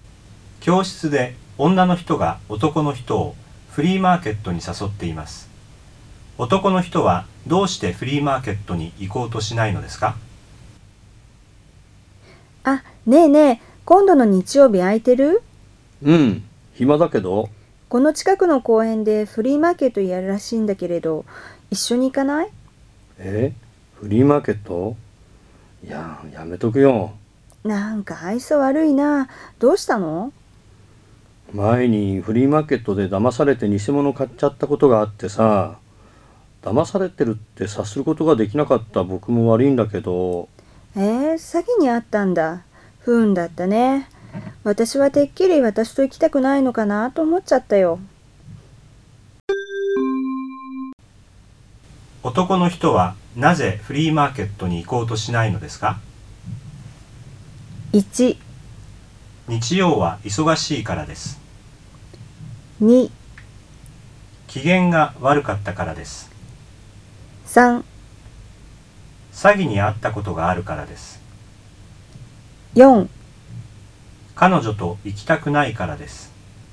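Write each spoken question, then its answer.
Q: 男の人はなぜフリーマーケットに行こうとしないのですか?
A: 3: 詐欺に遭ったことがあるからです。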